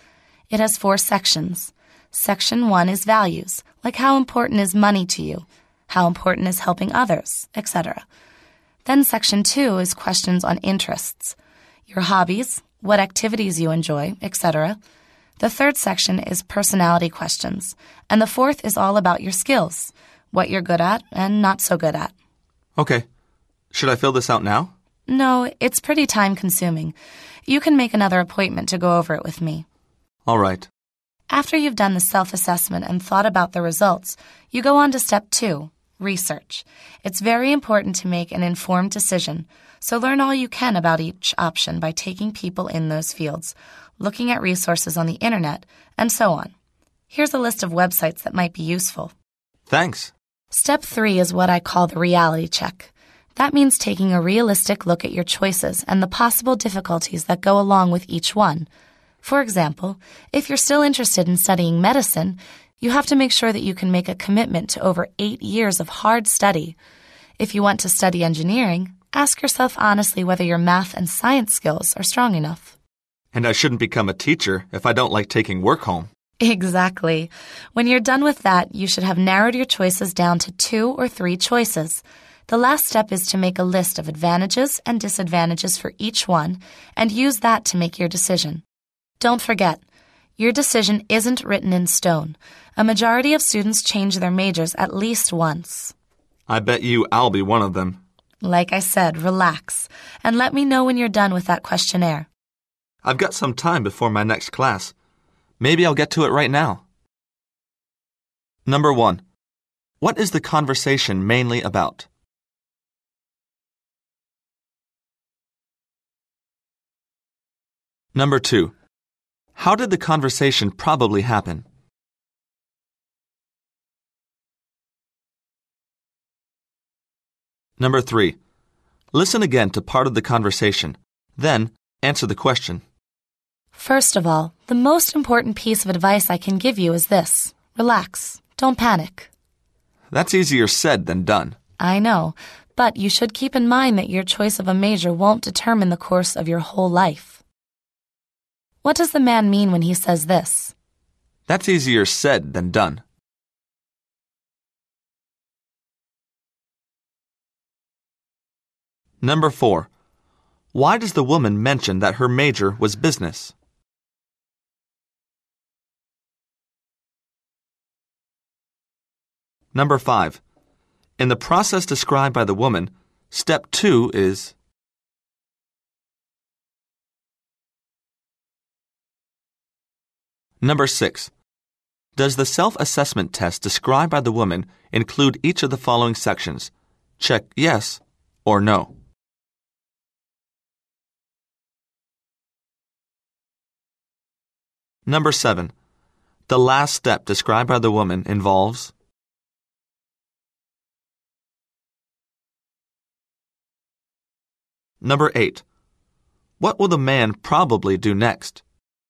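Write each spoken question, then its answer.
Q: In the process described by the woman, step two is...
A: research

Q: The last step described by the woman involves...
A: making a list of advantages and disadvantages for each choice

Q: What will the man probably do next?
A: Fill out the questionnaire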